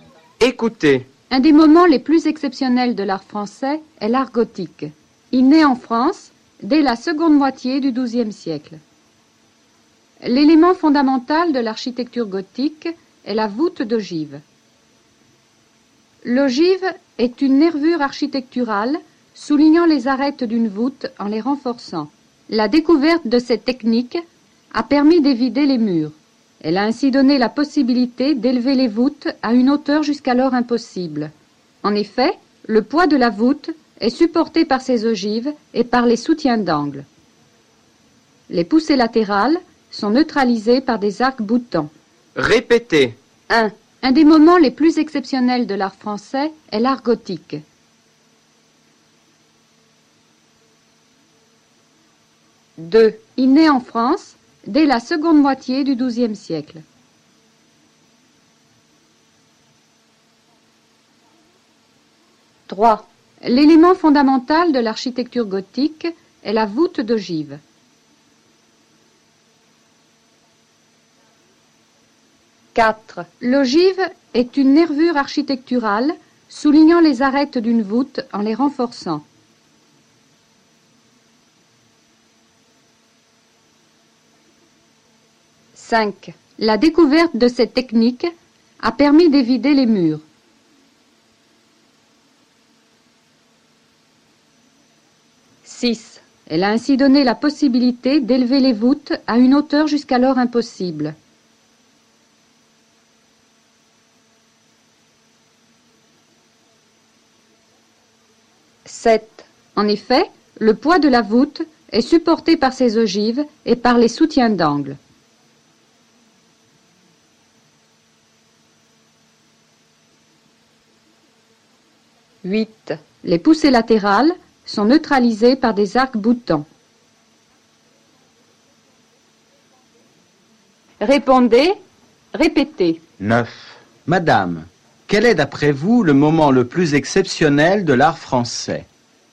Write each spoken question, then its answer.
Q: Madame, quel est d'après vous le moment le plus exceptionnel de l'art français?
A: Un des moments les plus exceptionnels de l'art français est l'art gothique.